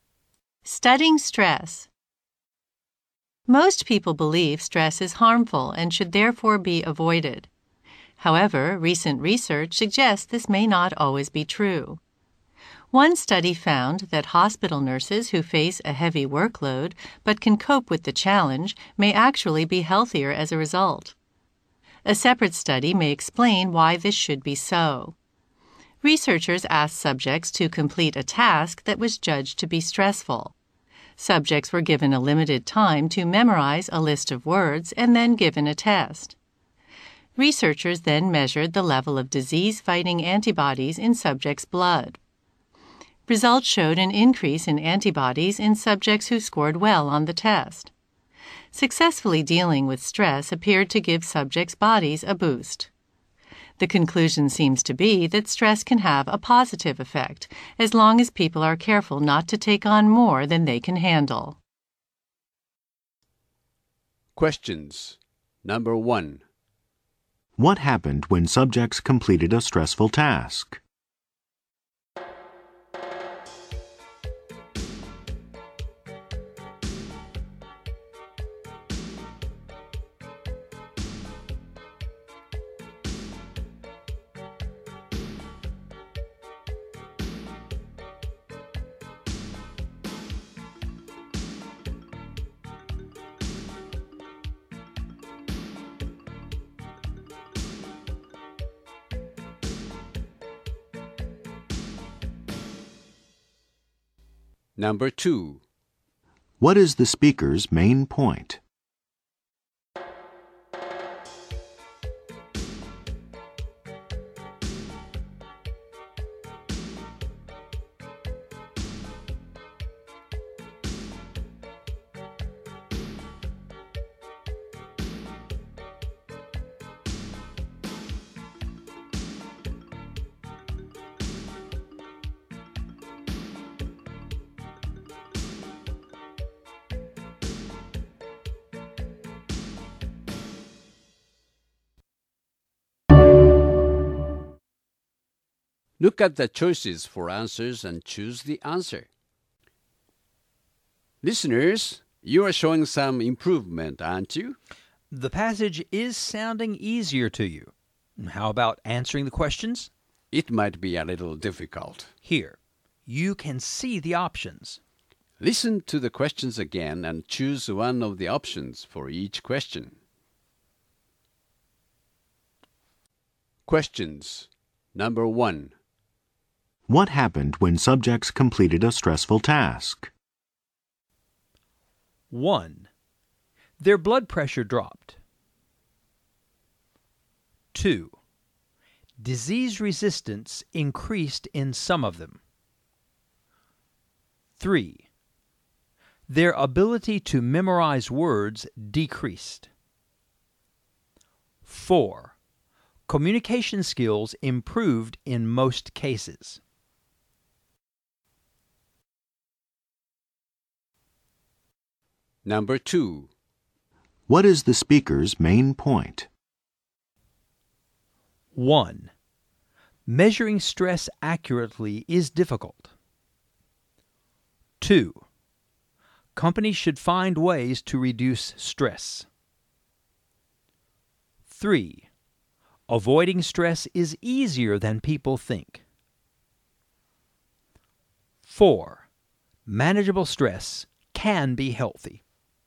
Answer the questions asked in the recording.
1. number two, disease resistance increased in some of them.
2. you should choose number four. Manageable stress can be healthy.